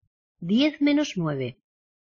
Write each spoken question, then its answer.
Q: ¿Diez menos nueve?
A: One.